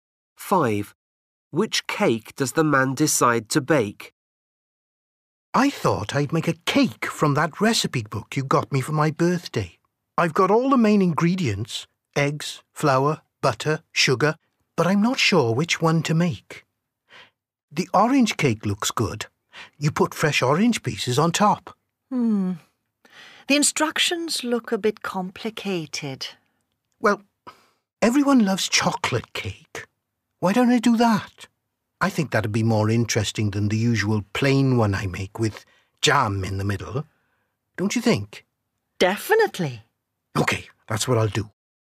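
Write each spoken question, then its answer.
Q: Which cake does the man decide to bake?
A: chocolate cake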